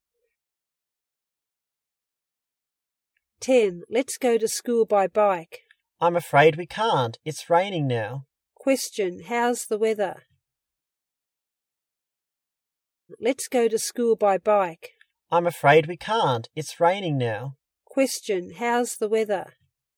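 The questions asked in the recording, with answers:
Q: Question, how's the weather?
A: Raining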